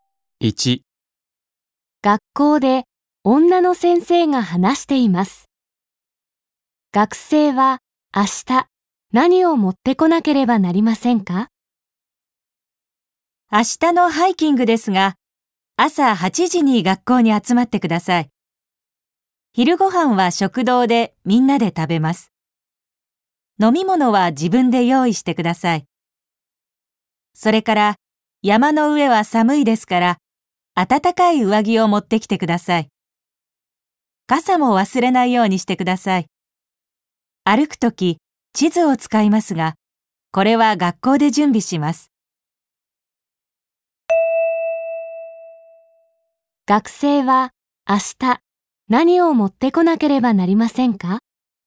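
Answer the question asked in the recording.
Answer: 飲み物、暖かい上着、傘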